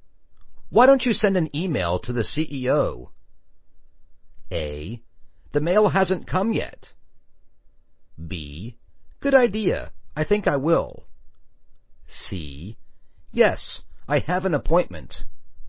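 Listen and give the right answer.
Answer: B: Good idea, I think I will.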